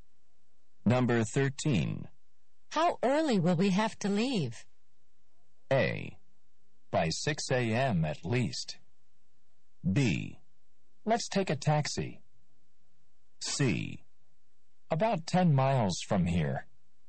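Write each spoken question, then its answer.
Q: How early will we have to leave?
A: A: By 6 a.m. at least.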